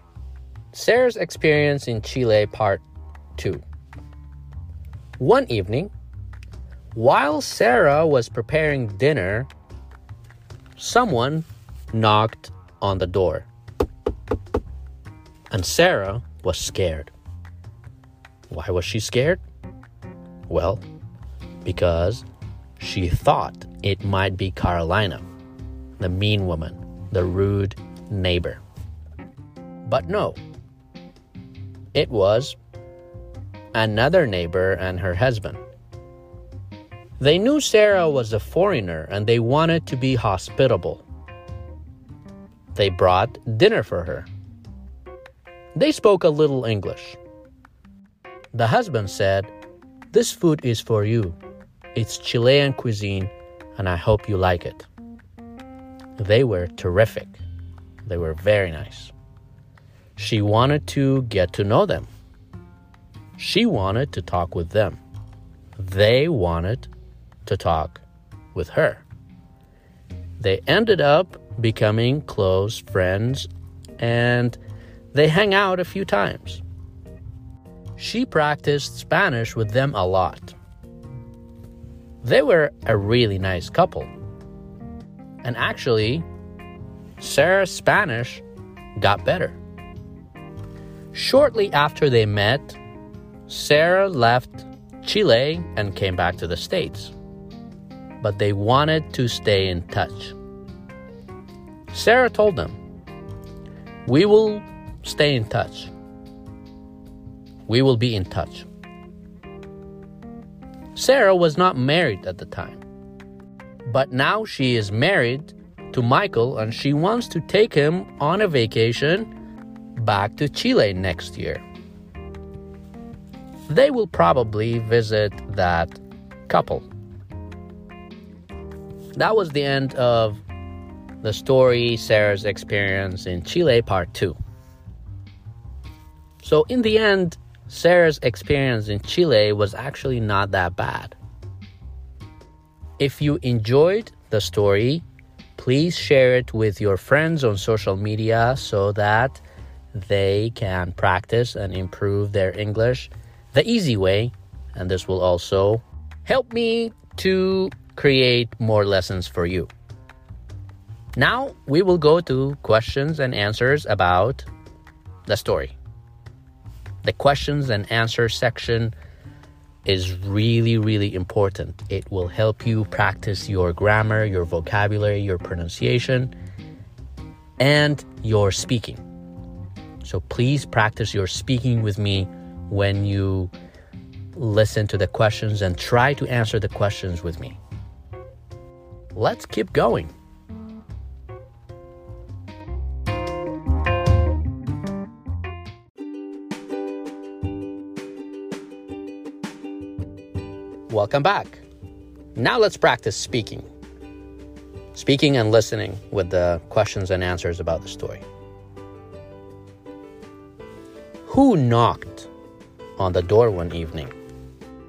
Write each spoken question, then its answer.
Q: Who knocked on the door one evening?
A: It was another neighbor and her husband.